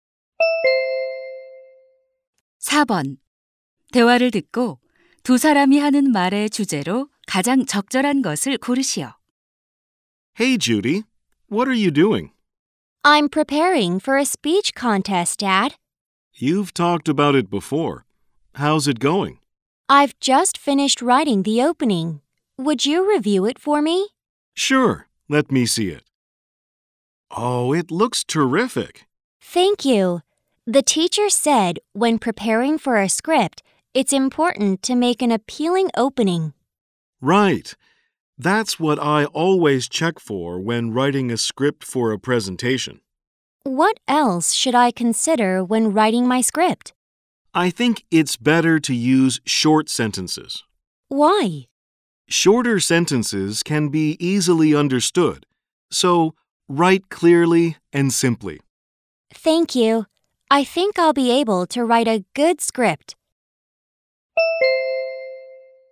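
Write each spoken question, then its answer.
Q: 대화를 듣고 두 사람이 하는 말의 주제로 가장 적절한 것을 고르시오.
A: 연설 원고를 잘 쓰는 방법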